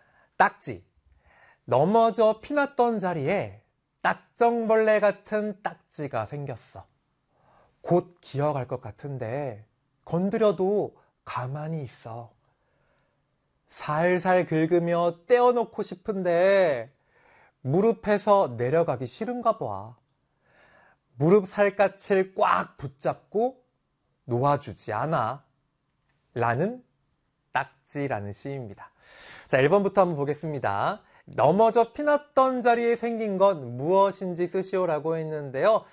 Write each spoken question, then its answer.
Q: 넘어져 피났던 자리에 생긴 건 무엇인지 쓰시오라고 했는데요.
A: 정답은 딱지라고 적어주면 되겠네요.